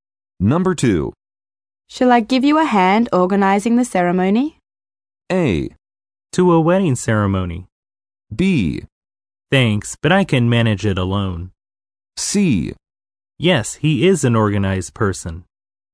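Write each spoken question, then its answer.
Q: Shall I give you a hand organizing the ceremony?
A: B: Thanks, but I can manage it alone.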